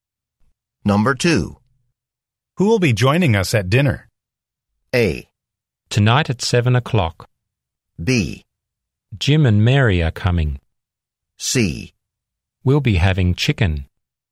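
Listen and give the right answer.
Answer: B: Jim and Mary are coming.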